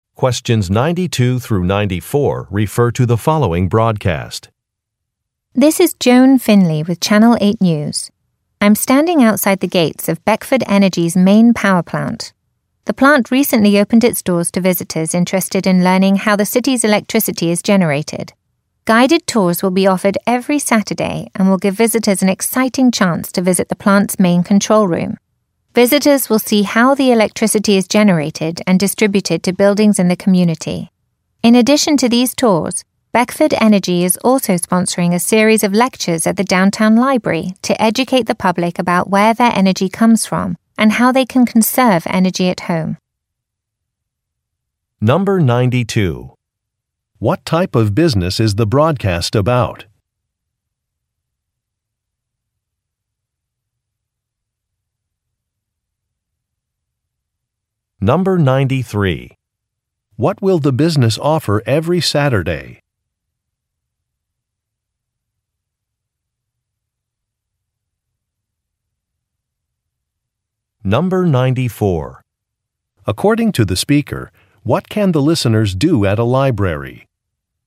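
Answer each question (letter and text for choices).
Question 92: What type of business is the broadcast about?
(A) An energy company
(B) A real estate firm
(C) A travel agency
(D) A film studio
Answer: (A) An energy company

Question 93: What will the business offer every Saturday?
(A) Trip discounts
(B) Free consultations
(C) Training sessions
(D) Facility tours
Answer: (D) Facility tours

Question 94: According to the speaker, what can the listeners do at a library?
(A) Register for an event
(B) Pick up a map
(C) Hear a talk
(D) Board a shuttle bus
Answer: (C) Hear a talk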